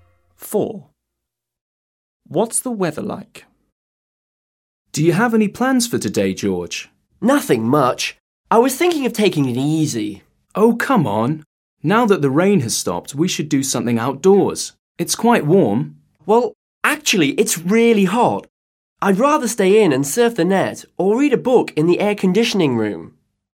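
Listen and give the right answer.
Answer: Really hot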